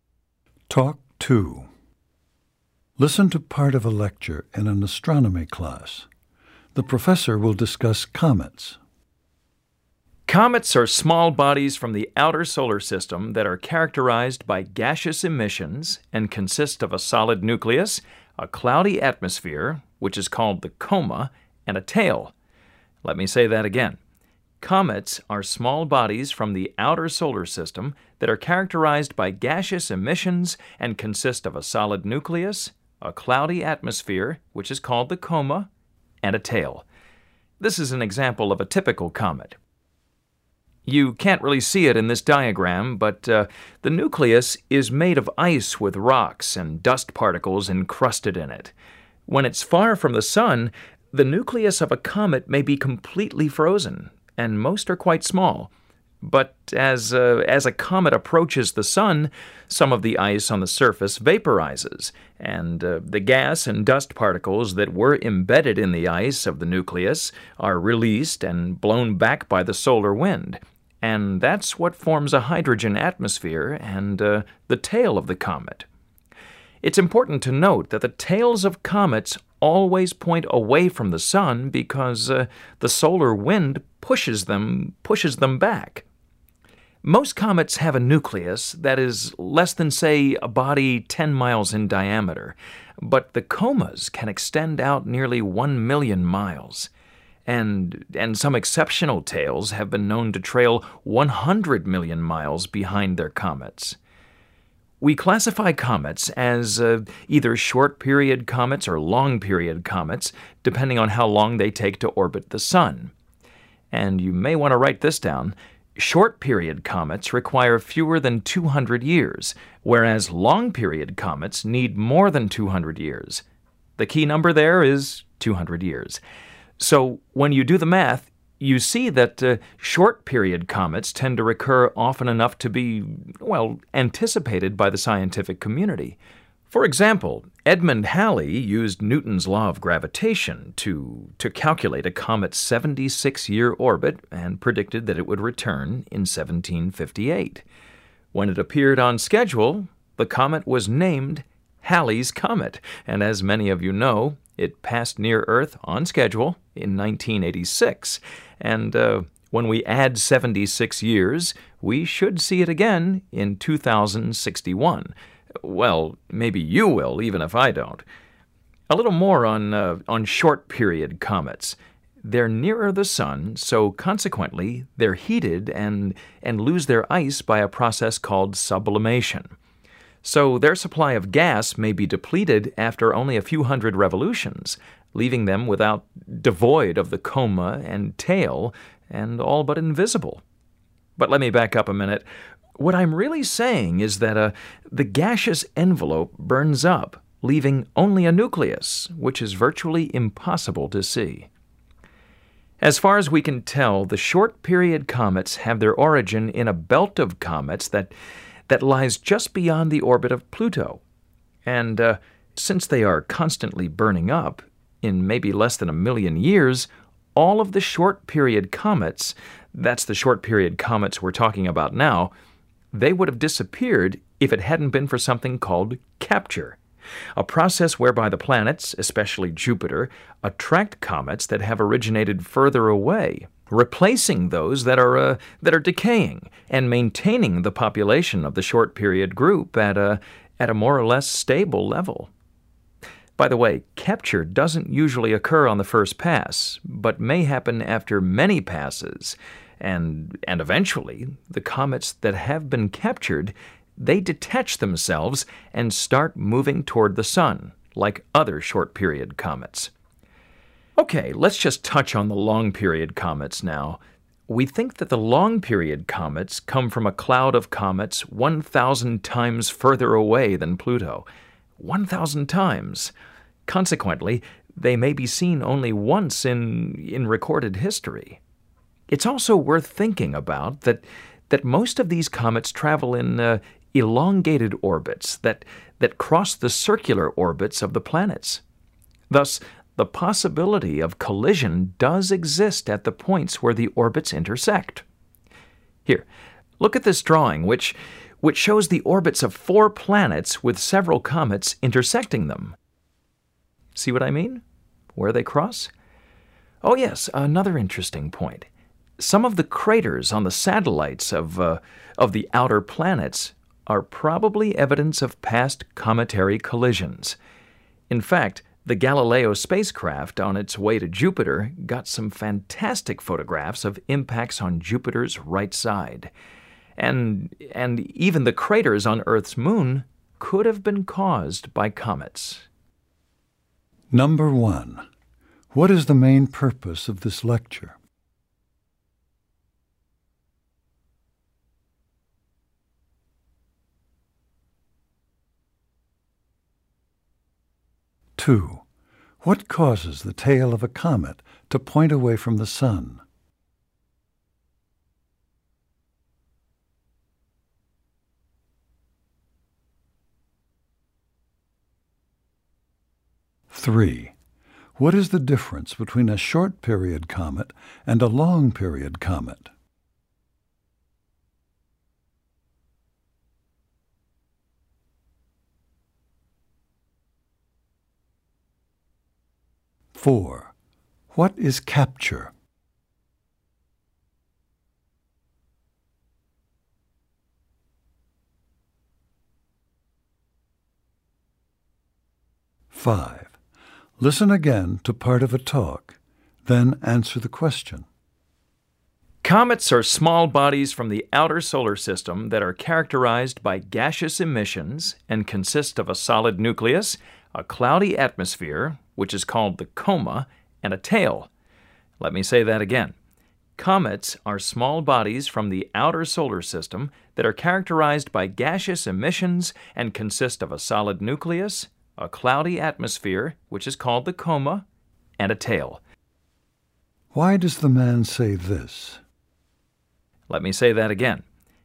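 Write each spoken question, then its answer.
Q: what causes the tail of a comet to point away from the Sun?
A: The solar wind pushes it back

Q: what is the difference between a short-period comet and a long-period comet?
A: Short-period comets take fewer than 200 years to orbit the Sun; long-period comets take more than 200 years

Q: what is capture?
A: A process in which planets, especially Jupiter, attract comets from farther away, replacing decaying short-period comets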